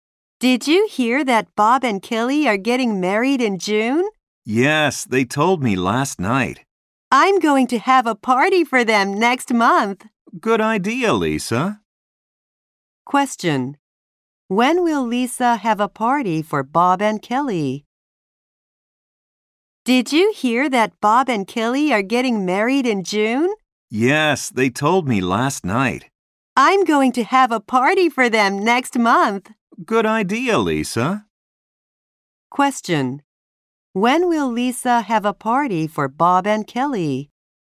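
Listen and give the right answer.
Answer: Next month.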